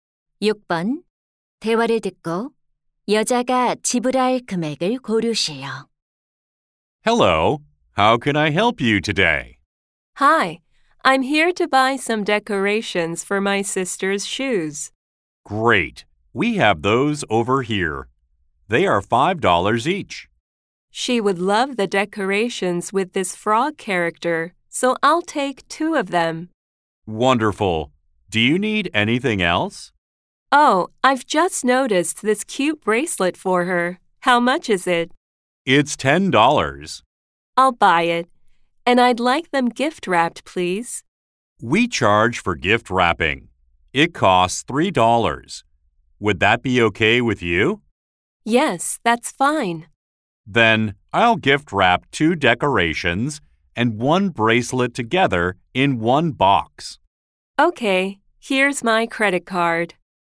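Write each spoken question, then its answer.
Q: 대화를 듣고 여자가 지불할 금액을 고르세요.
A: $23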